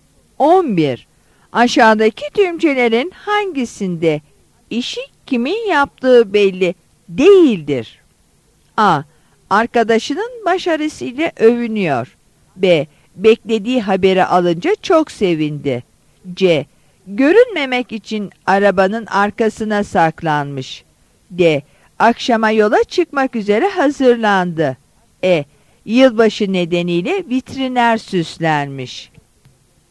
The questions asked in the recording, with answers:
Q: Aşağıdaki tümcelerin hangisinde İşi kimin yaptığı belli değildir?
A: Yanıt E'dir.